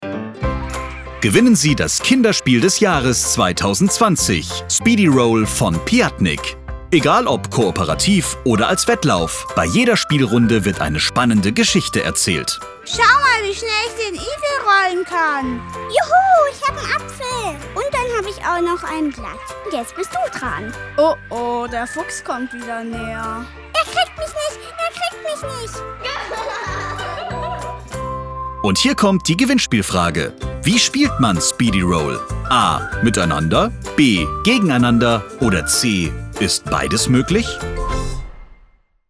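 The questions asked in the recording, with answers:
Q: Wie spielt man Speedy Roll?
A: C: Ist beides möglich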